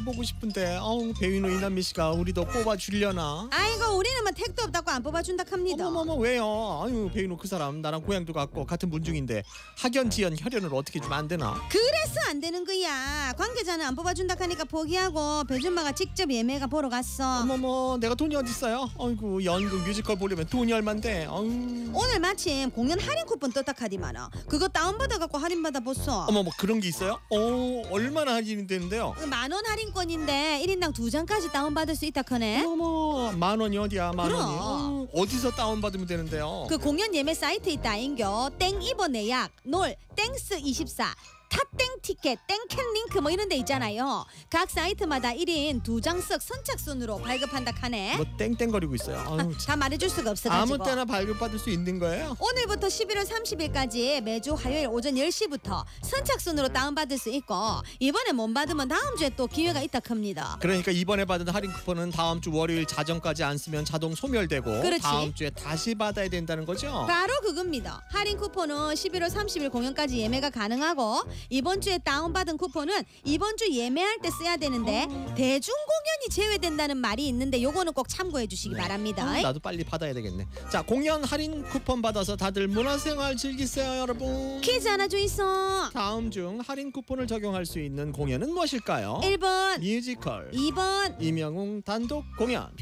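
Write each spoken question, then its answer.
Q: 다음 중 할인 쿠폰을 적용할 수 있는 공연은 무엇일까요?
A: 1: 뮤지컬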